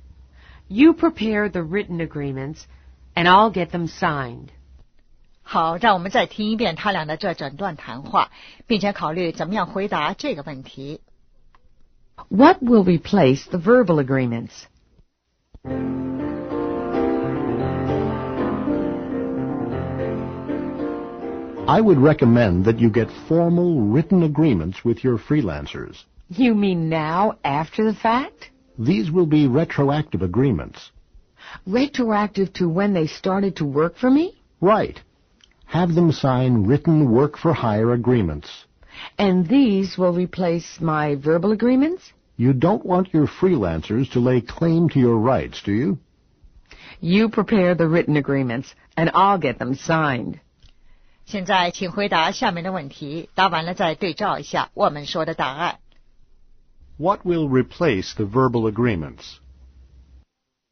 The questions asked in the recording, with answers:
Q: What will replace the verbal agreements?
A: Formal written agreements.